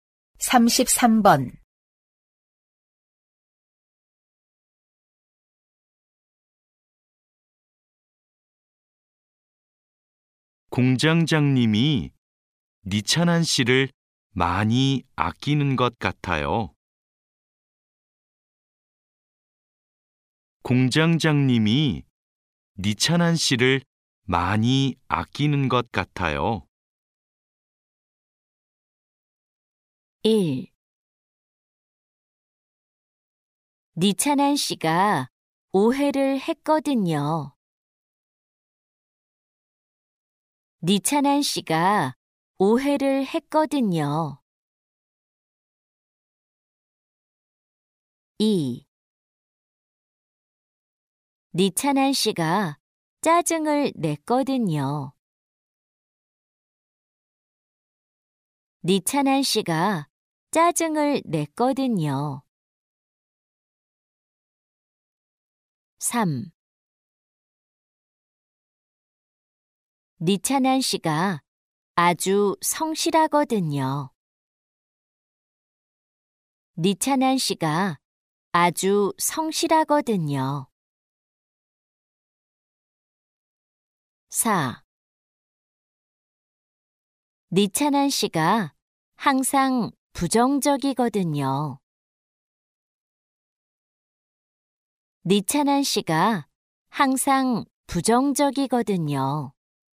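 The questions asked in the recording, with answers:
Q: 공장장님이 니찬한 씨를 많이 아끼는 것 같아요.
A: 3: 니찬한 씨가 아주 성실하거든요.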